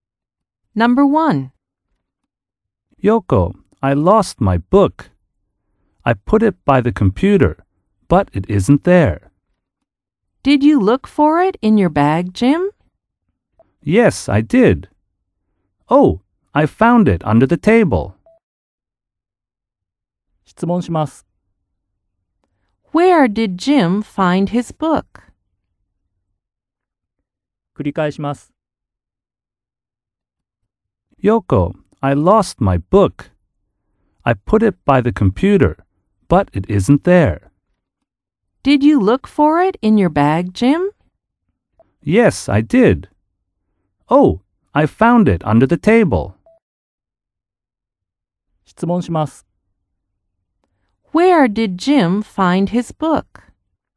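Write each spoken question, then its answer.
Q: Where did Jim find his book?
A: Under the table.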